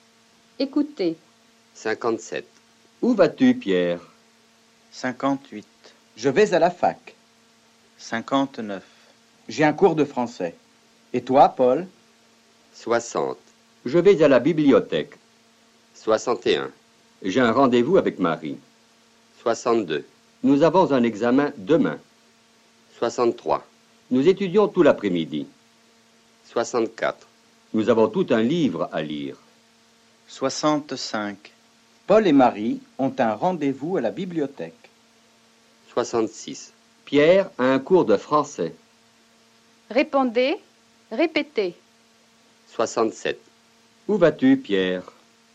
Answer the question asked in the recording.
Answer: Je vais à la fac.